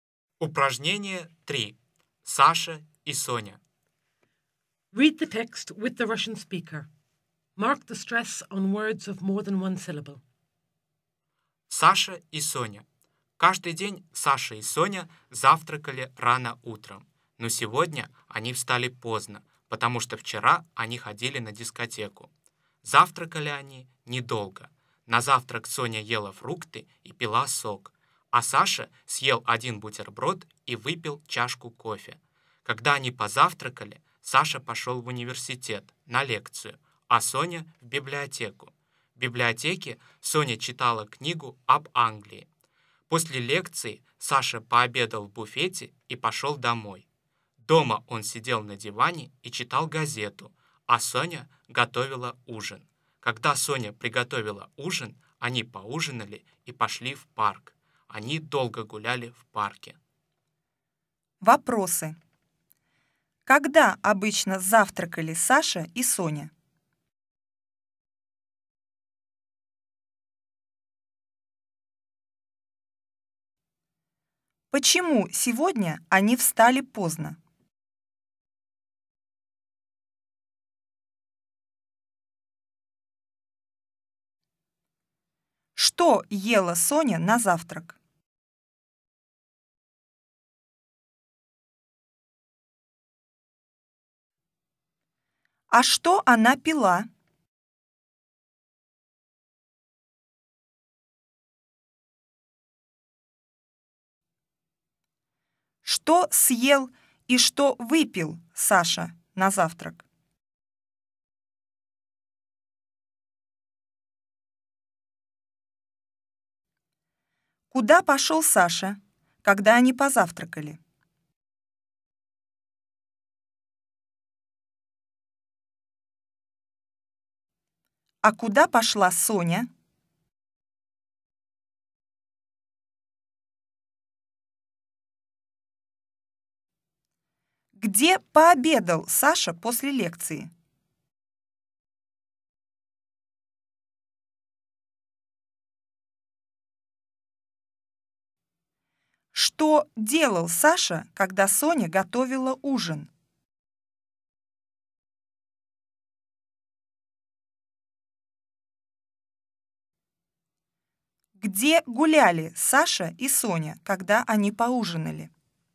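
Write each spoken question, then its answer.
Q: Когда обычно завтракали Саша и Соня?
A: Рано утром

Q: Почему сегодня они встали поздно?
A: Потому что вчера они ходили на дискотеку

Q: Что ела Соня на завтрак?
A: Фрукты

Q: А что она пила?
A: Сок

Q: Что съел и что выпил Саша на завтрак?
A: Съел один бутерброд и выпил чашку кофе

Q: Куда пошел Саша, когда они позавтракали?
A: В университет на лекцию

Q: А куда пошла Соня?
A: В библиотеку

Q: Где пообедал Саша после лекции?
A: В буфете

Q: Что делал Саша, когда Соня готовила ужин?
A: Сидел на диване и читал газету

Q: Где гуляли Саша и Соня, когда они поужинали?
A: В парке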